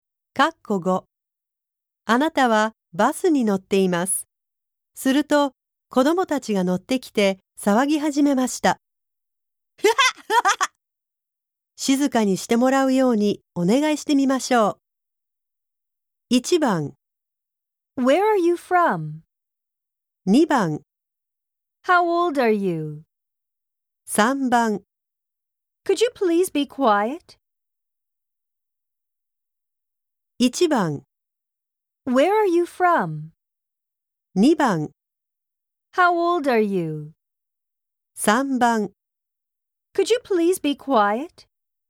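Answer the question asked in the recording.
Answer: 3: Could you please be quiet?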